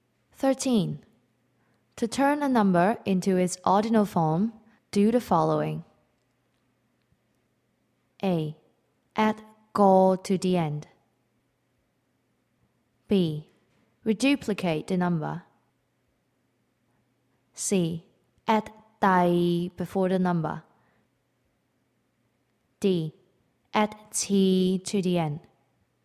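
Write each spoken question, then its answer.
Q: To turn a number into its ordinal form, do the following.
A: C: Add 第 before the number.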